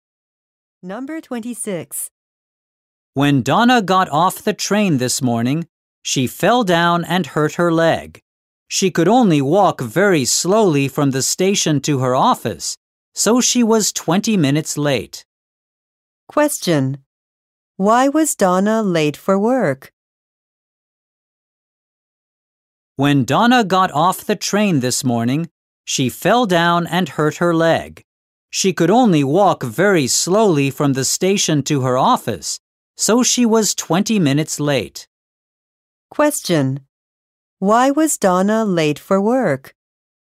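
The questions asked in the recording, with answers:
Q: Question: Why was Donna late for work?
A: She hurt her leg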